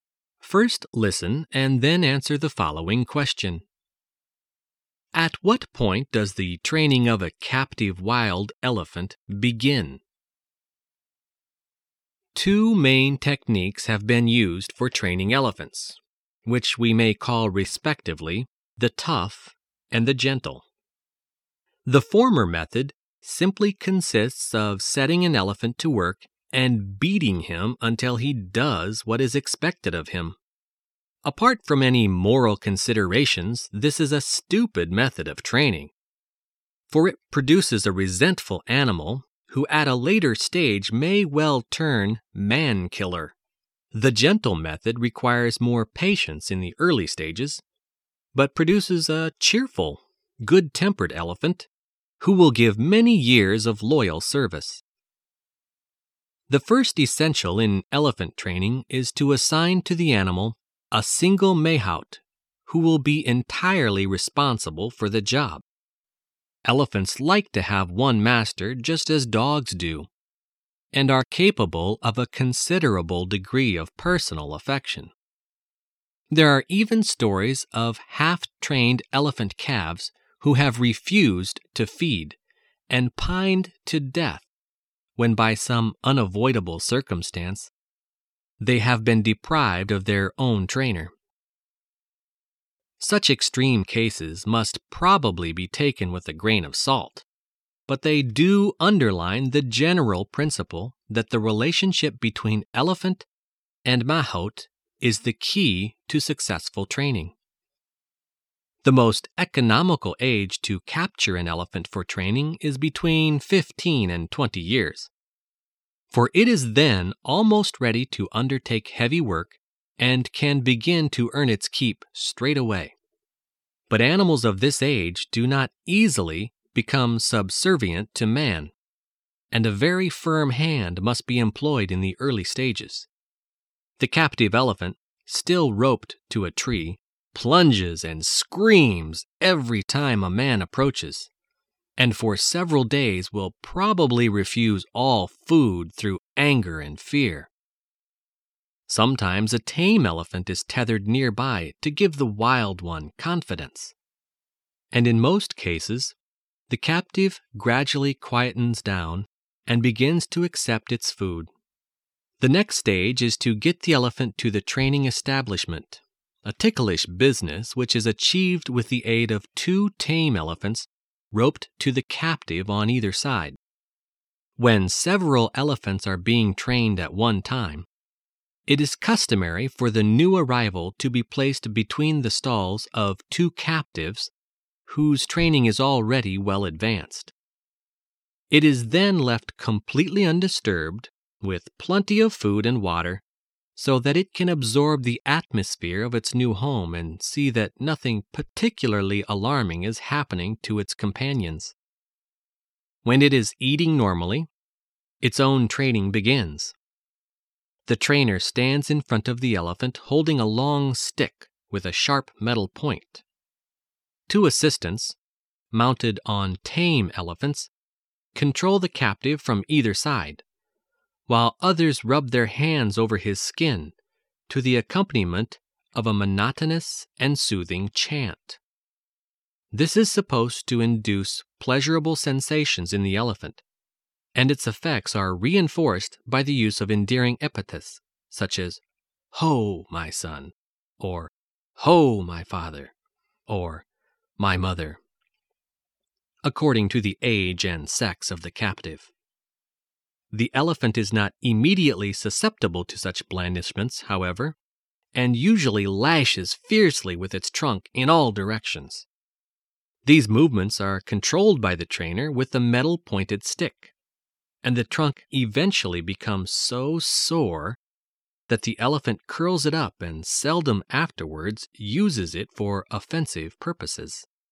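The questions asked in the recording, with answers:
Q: At what point does the training of a captive wild elephant begin?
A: When it is eating normally (in its new home at the training establishment)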